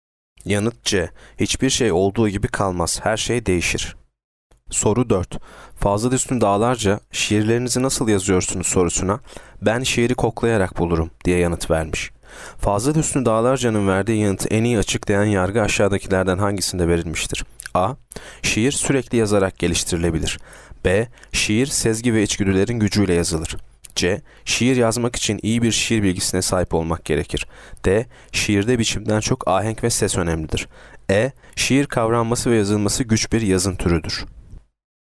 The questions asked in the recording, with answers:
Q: Fazla Üstün Dağlarca'nın verdiği yanıtı en iyi açıklayan yargı aşağıdakilerden hangisinde verilmiştir?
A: Yanıt B. Şiir, sezgi ve içgüdülerin gücüyle yazılır.